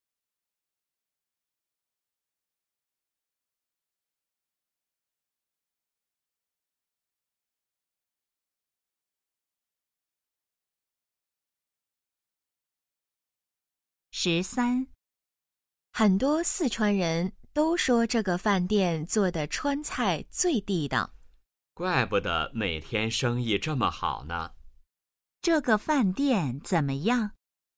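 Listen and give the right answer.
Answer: 川菜很地道,生意很好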